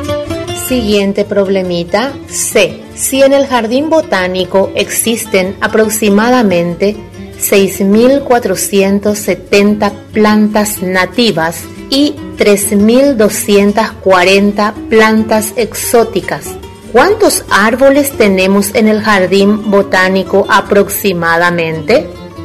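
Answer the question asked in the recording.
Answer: 9.710 plantas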